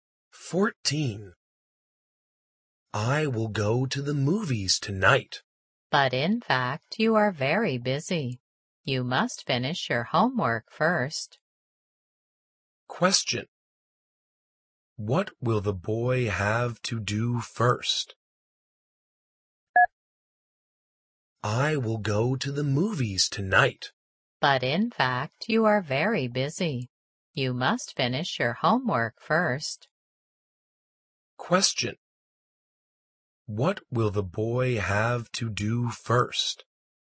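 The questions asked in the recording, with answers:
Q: What will the boy have to do first?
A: Finish his homework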